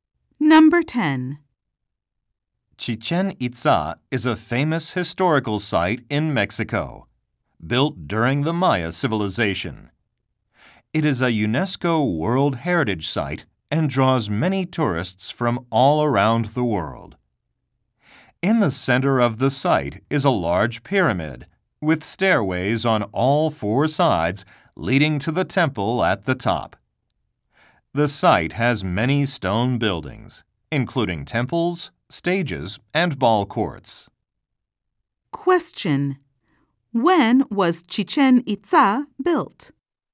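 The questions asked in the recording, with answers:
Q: When was Chichen Itza built?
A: During the Maya civilization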